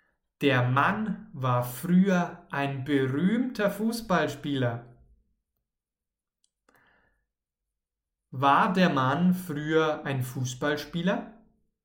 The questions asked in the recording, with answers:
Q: War der Mann früher ein Fußballspieler?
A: Ja. Der Mann war früher ein berühmter Fußballspieler.